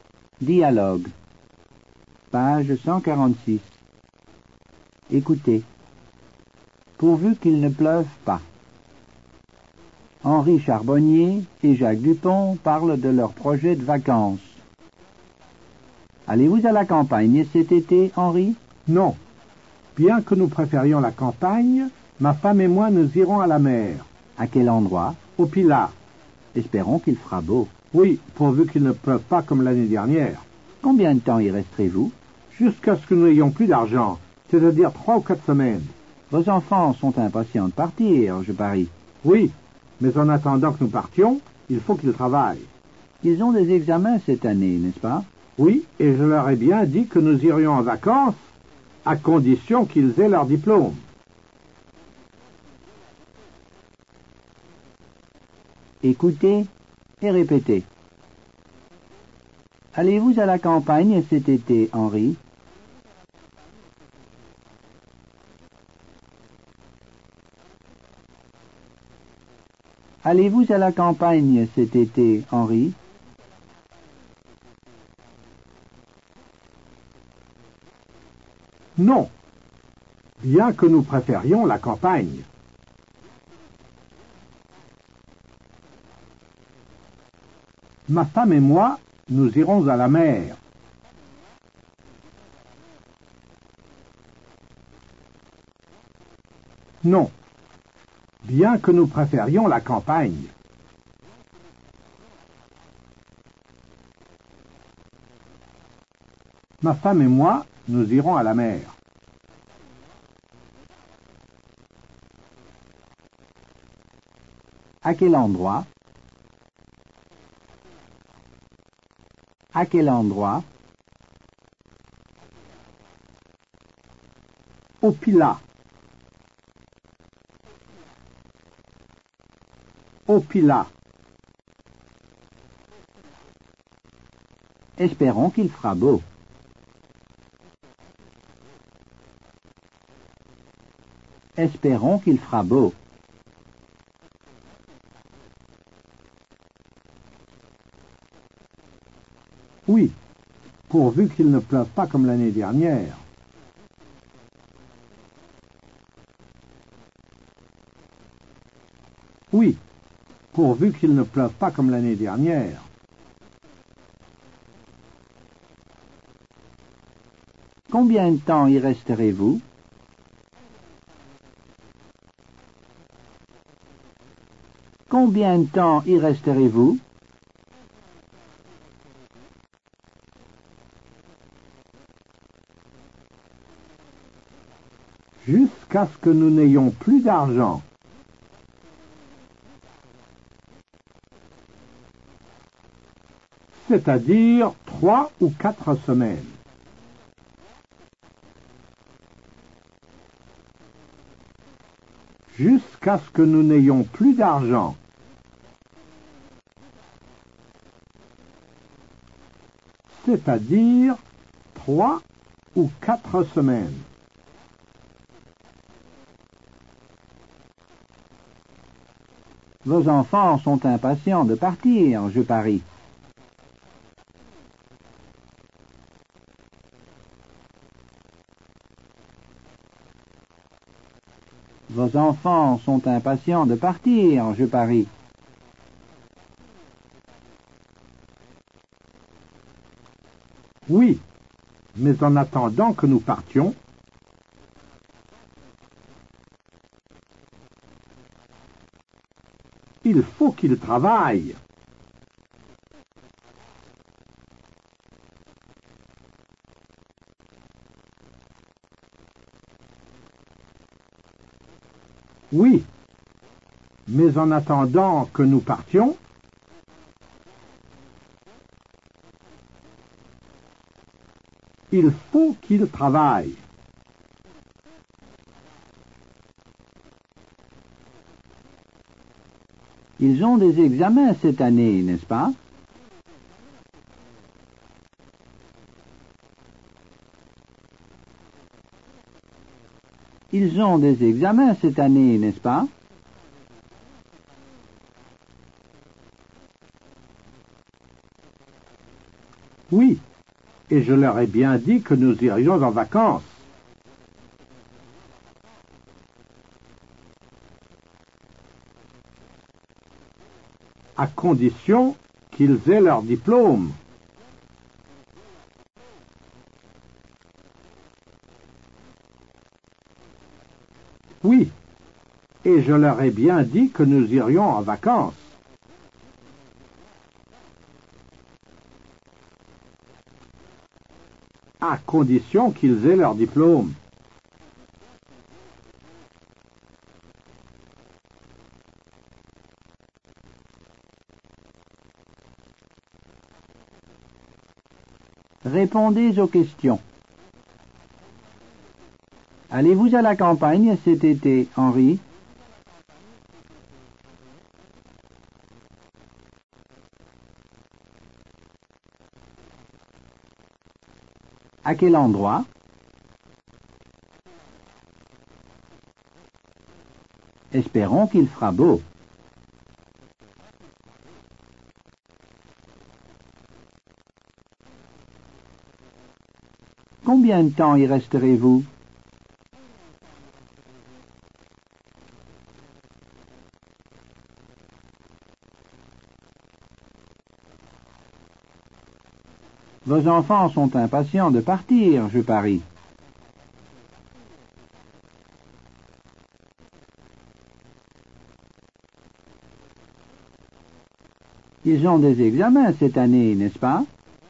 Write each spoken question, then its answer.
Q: Allez-vous à la campagne cet été, Henri?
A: Non. Bien que nous préférions la campagne, ma femme et moi, nous irons à la mer.

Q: À quel endroit?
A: Au Pila.

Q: Espérons qu'il fera beau.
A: Oui, pourvu qu'il ne pleuve pas comme l'année dernière.

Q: Combien de temps y resterez-vous?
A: Jusqu'à ce que nous n'ayons plus d'argent, c'est-à-dire 3 ou 4 semaines.

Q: Vos enfants sont impatients de partir, je parie.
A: Oui. Mais en attendant que nous partions, il faut qu'il travaille.

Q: Ils ont des examens cette année, n'est-ce pas?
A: Oui, et je leur ai bien dit que nous irions en vacances, à condition qu'ils aient leur diplôme.